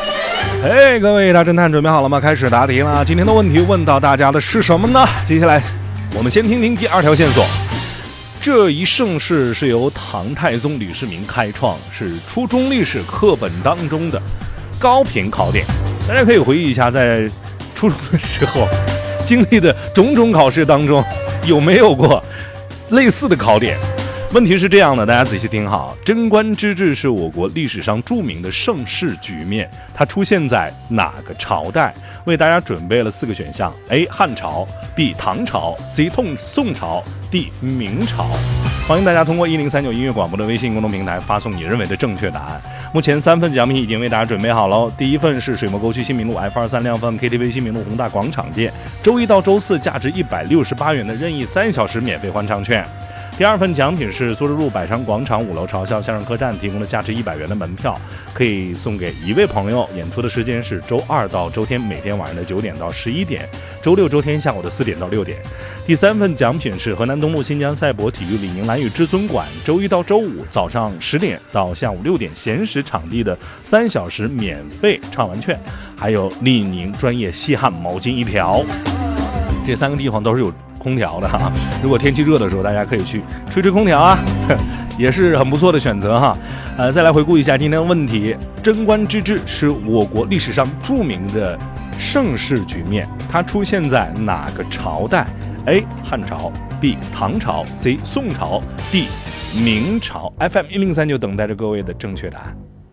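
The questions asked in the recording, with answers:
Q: 贞观之治是我国历史上著名的盛世局面,它出现在哪个朝代?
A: B: 唐朝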